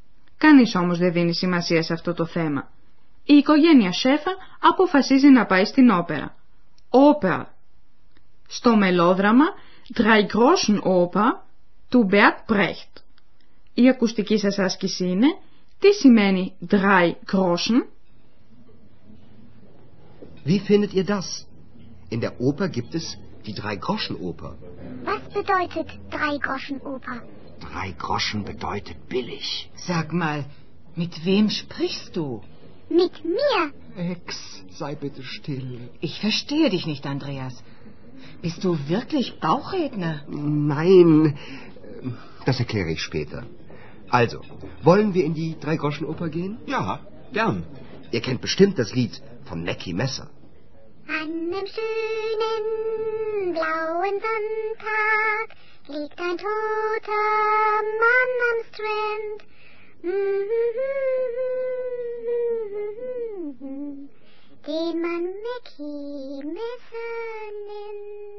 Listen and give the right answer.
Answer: Καταλάβατε ότι «drei groschen» σημαίνει φτηνός.